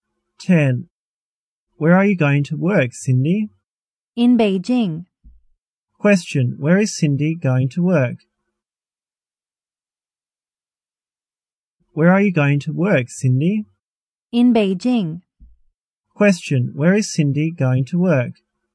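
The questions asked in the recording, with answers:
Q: Question, where is Cindy going to work?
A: In Beijing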